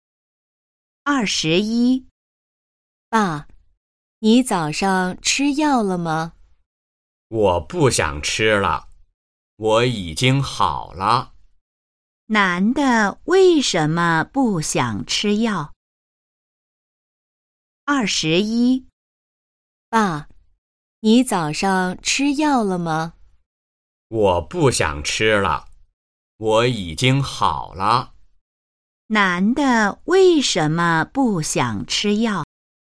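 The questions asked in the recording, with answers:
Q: 男的为什么不想吃药?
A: 他已经好了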